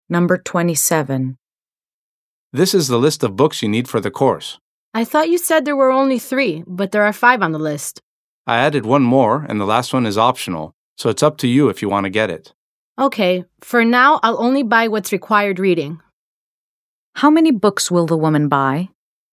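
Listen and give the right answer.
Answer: Four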